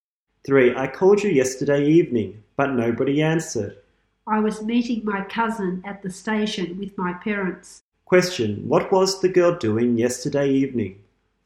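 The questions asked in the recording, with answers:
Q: what was the girl doing yesterday evening?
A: Meeting her cousin at the station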